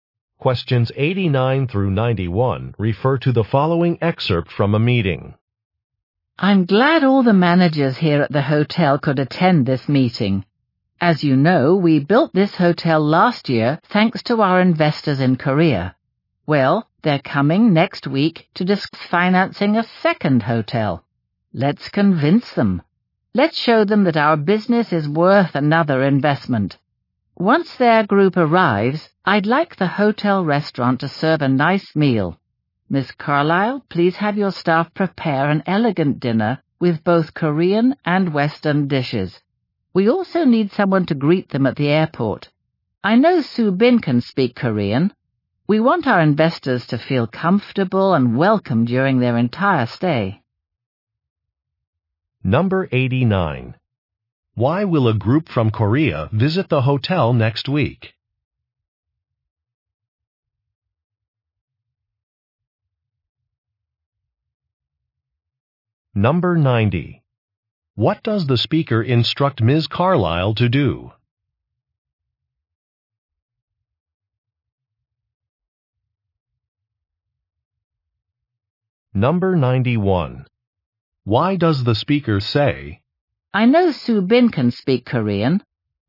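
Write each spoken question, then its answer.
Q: Why will a group from Korea visit the hotel next week?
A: To discuss financing a second hotel

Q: What does the speaker instruct Ms.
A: Have her staff prepare an elegant dinner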